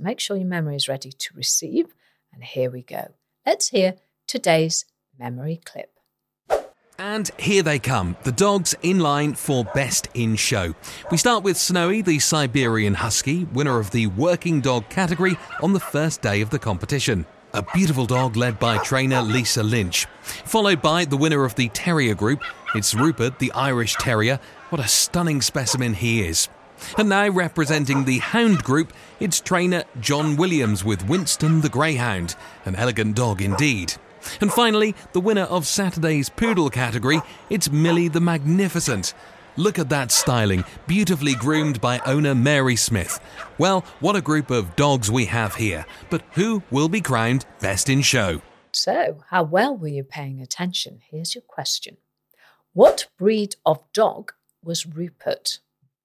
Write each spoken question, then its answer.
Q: What breed of dog was Rupert?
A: Rupert was an Irish Terrier.